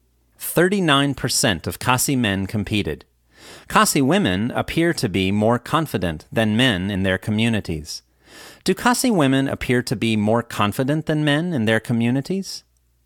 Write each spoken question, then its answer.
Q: Do Khasi women appear to be more confident than men in their communities?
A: Yes, Khasi women appear to be more confident than men in their communities.